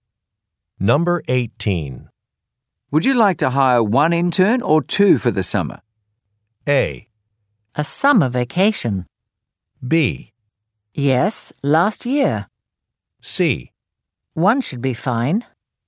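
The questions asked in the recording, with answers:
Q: Would you like to hire one intern or two for the summer?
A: C: One should be fine.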